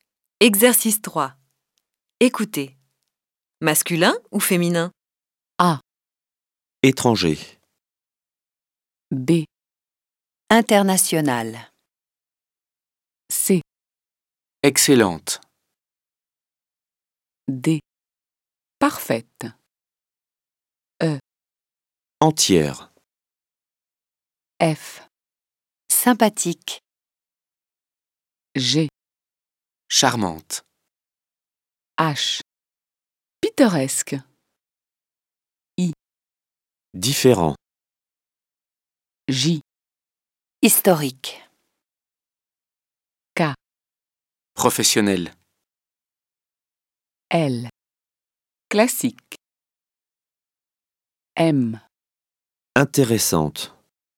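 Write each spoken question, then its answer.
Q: Étranger.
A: masculin

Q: International.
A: masculin

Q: Excellente.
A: féminin

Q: Parfaite.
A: féminin

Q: Entière.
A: féminin

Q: Charmante.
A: féminin

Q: Différent.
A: masculin

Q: Professionnel.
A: masculin

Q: Intéressante.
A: féminin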